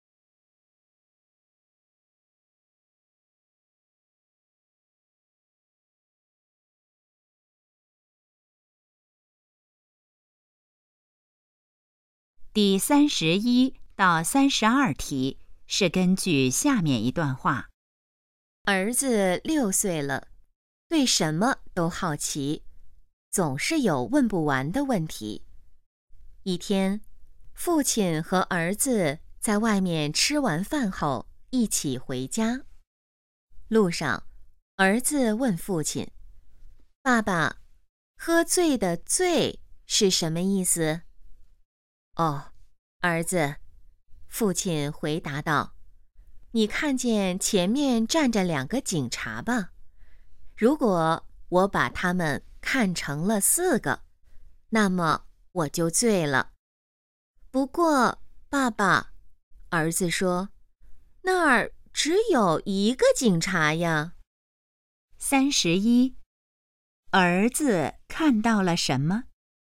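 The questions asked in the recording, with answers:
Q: 儿子看到了什么?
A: 一个警察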